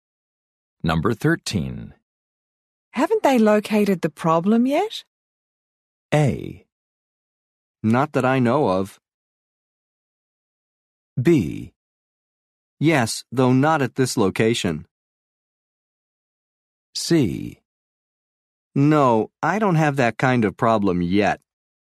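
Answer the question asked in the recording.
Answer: A: Not that I know of.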